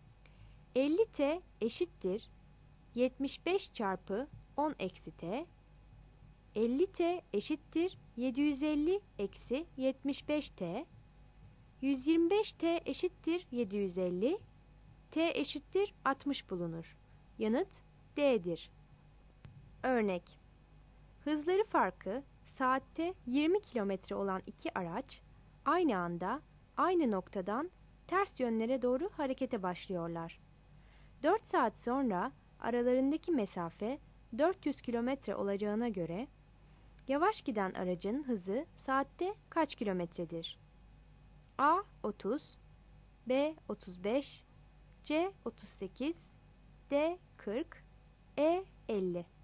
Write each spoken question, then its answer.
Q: 4 saat sonra aralarındaki mesafe 400 km olacağına göre yavaş giden aracın hızı saatte kaç kilometredir?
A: Yanıt D'dir.